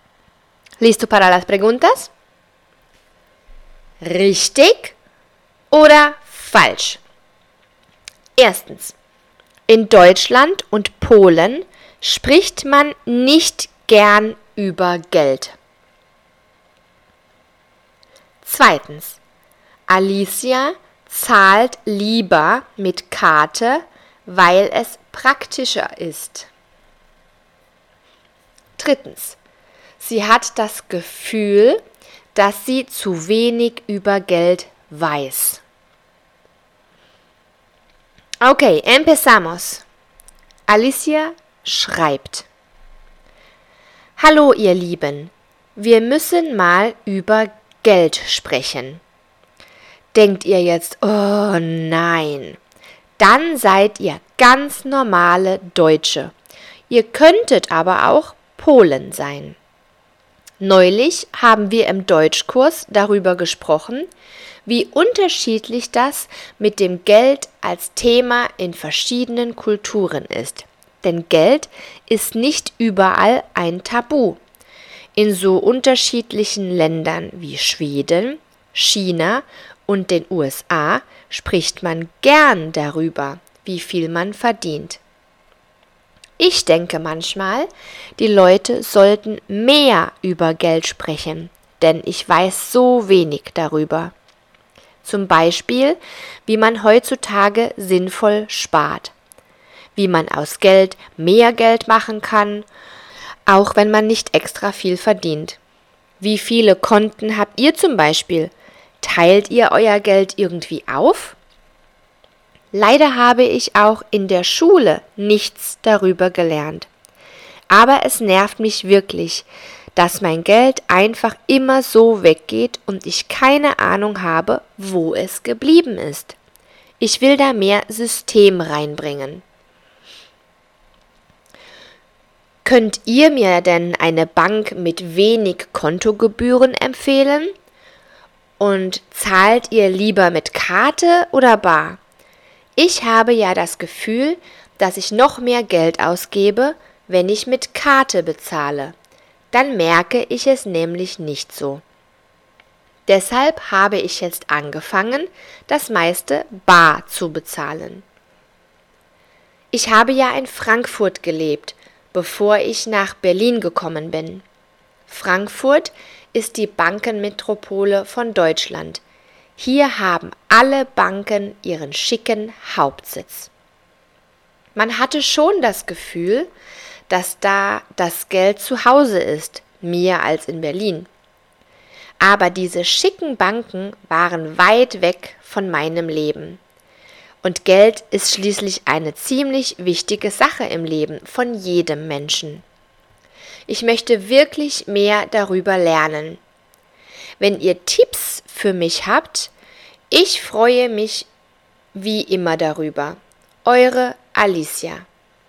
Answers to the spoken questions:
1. Das ist richtig.
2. Das ist falsch.
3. Das ist richtig.